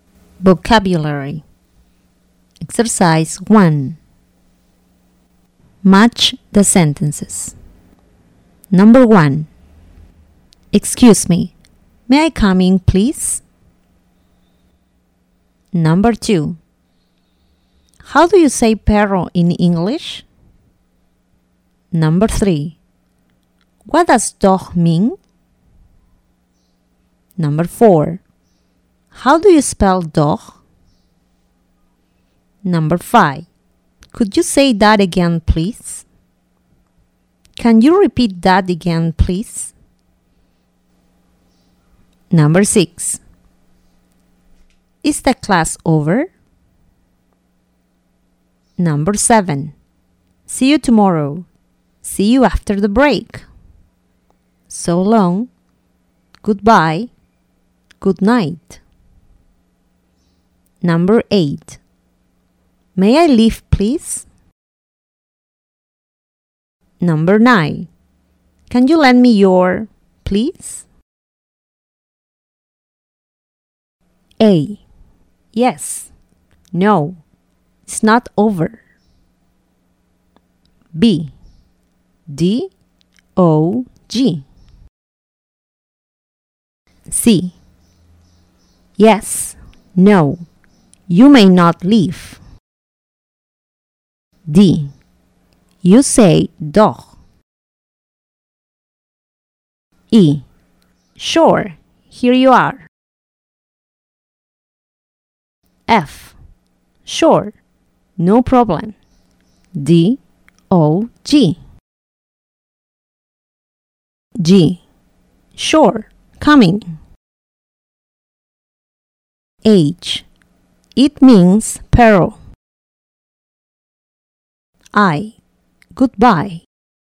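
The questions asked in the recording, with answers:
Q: Excuse me, may I come in, please?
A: G: Sure. Coming.

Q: How do you say perro in English?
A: D: You say doch.

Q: What does dog mean?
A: H: It means peril.

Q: Is the class over?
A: A: Yes. No. It's not over.

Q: See you tomorrow.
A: I: Goodbye.

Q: May I leave, please?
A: C: Yes. No. You may not leave.

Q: Can you lend me your, please?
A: E: Sure. Here you are.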